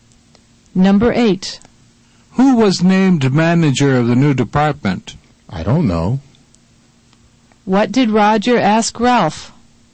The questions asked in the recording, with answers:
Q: What did Roger ask Ralph?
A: Roger asked Ralph who was named manager of the new department.